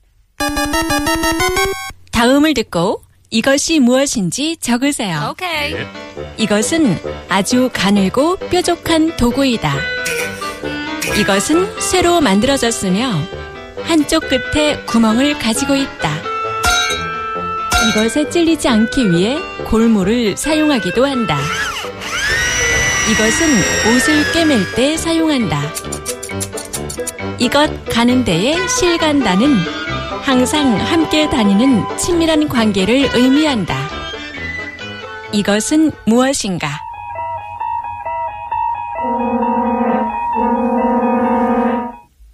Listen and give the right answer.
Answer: 하나, 둘, 셋, 바늘! Needle. That is the answer.